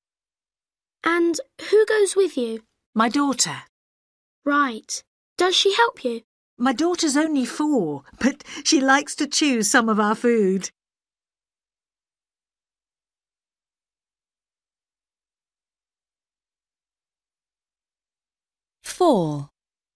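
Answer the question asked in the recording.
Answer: her daughter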